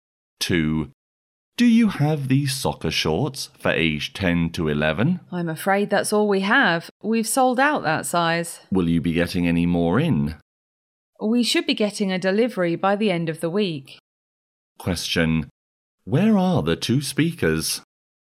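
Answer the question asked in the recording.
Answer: In a shop selling sports clothes.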